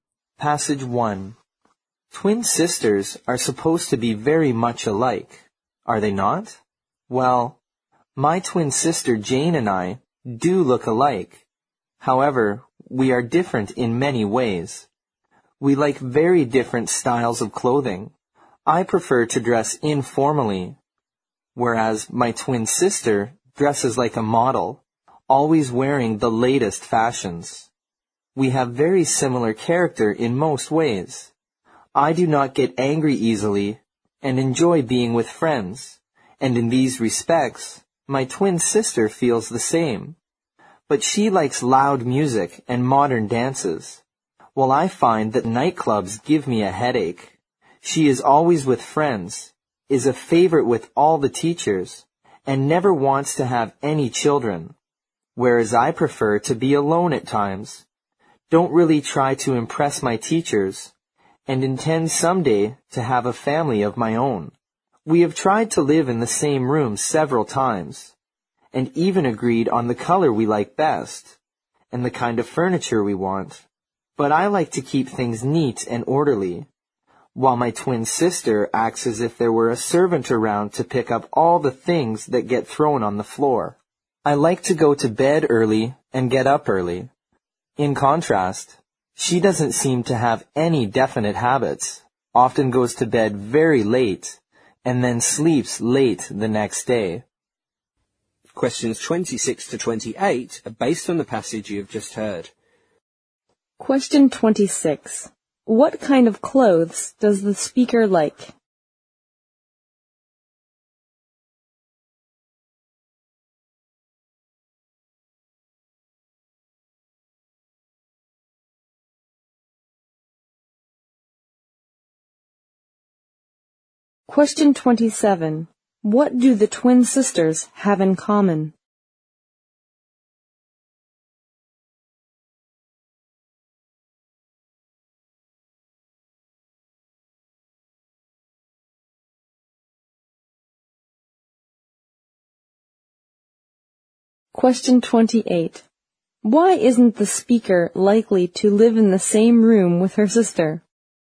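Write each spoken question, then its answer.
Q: What kind of clothes does the speaker like?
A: Informal clothes

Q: What do the twin sisters have in common?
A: They don't get angry easily and enjoy being with friends.

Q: Why isn't the speaker likely to live in the same room with her sister?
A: Their habits differ: she is neat and orderly, her sister is messy.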